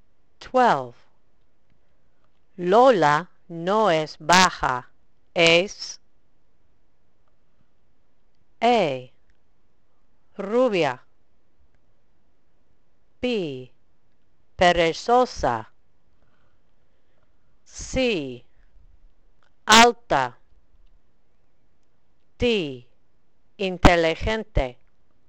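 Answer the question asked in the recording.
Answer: C: alta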